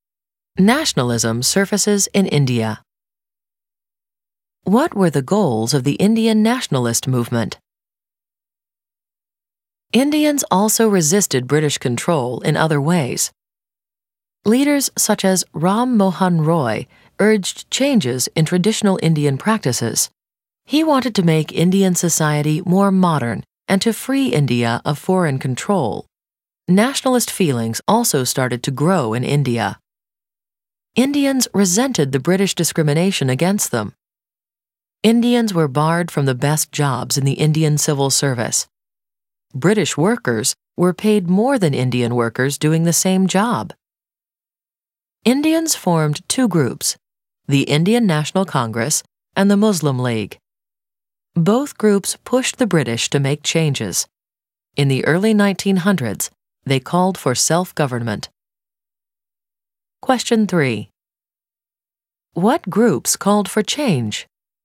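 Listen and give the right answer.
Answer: The Indian National Congress and the Muslim League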